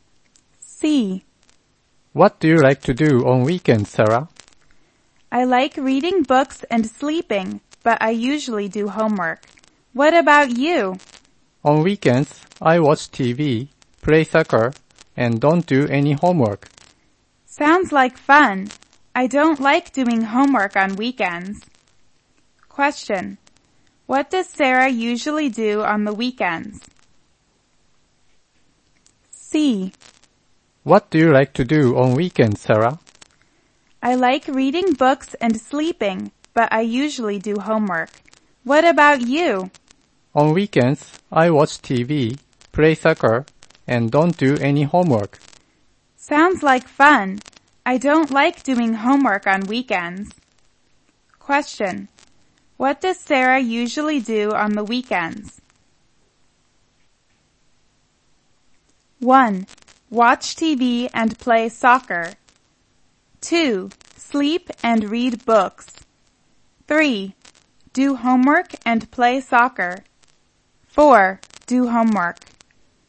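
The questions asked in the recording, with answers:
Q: What does Sarah usually do on the weekends?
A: 4: Do homework.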